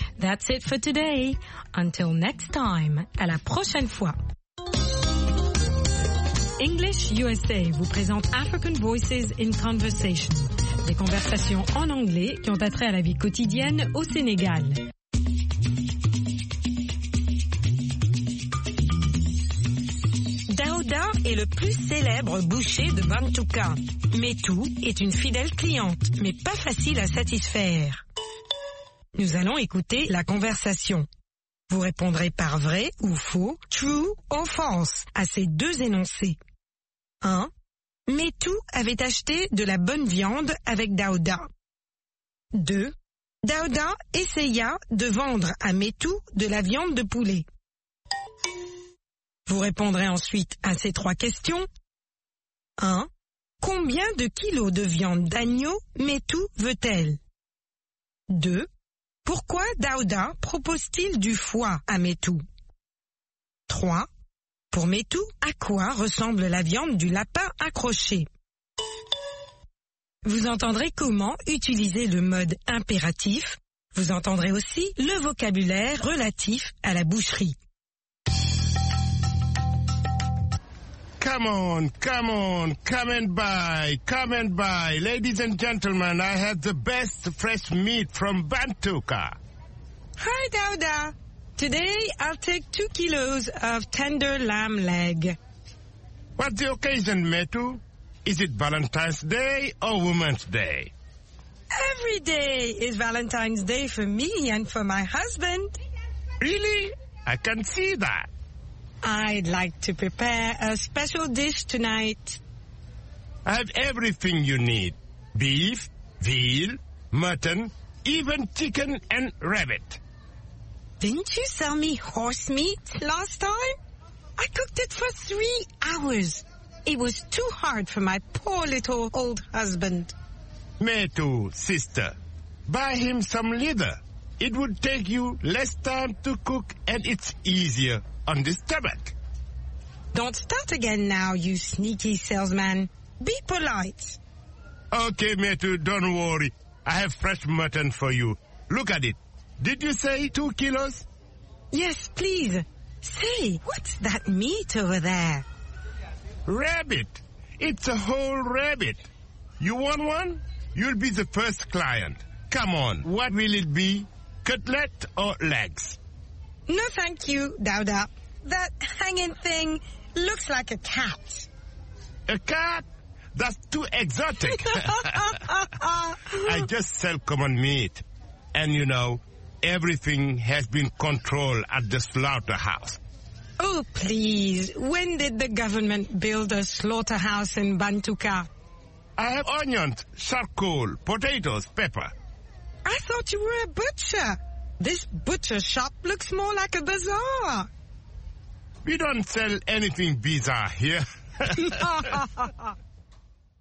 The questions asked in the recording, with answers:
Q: Métou avait acheté de la bonne viande avec Daouda.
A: L'énoncé 1 est faux.

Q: Daouda essaya de vendre à Métou de la viande de poulet.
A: L'énoncé 2 est faux.

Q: Combien de kilos de viande d'agneau Métou veut-elle?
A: 2 kilos.

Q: Pourquoi Daouda propose-t-il du foie à Métou?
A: Ça prend moins de temps à cuire.

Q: Pour Métou, à quoi ressemble la viande du lapin accroché?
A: À un chat.